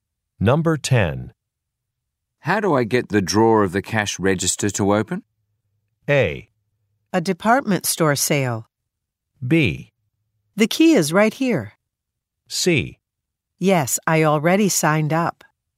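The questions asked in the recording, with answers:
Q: How do I get the drawer of the cash register to open?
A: B: The key is right here.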